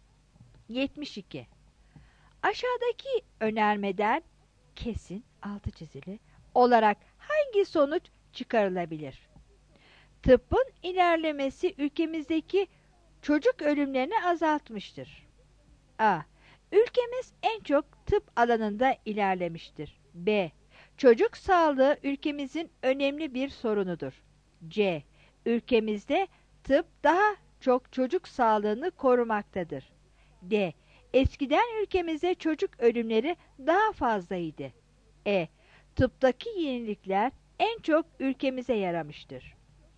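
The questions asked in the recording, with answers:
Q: Aşağıdaki önermeden kesin, altı çizili, olarak hangi sonuç çıkarılabilir?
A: D: Eskiden ülkemizde çocuk ölümleri daha fazlaydı.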